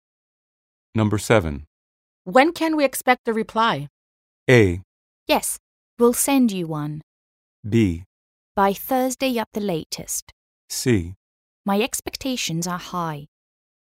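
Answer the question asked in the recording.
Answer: B: By Thursday at the latest.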